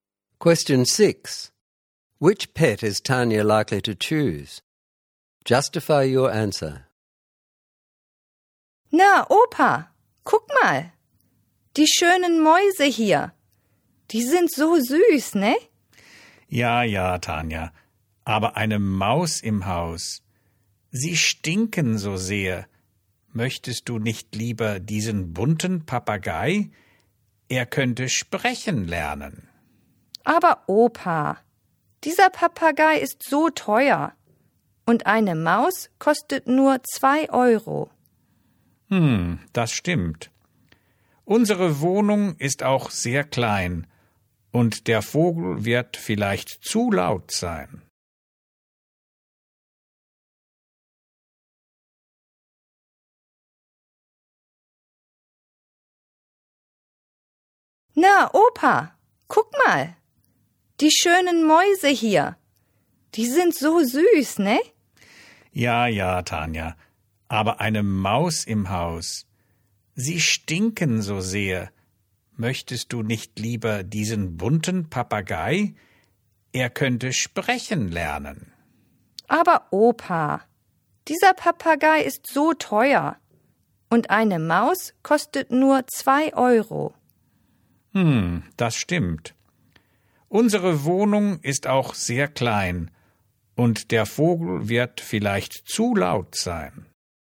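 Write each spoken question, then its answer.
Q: Which pet is Tanya likely to choose?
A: A mouse: the parrot is too expensive, a mouse costs only 2 euros, the flat is small and the bird may be too loud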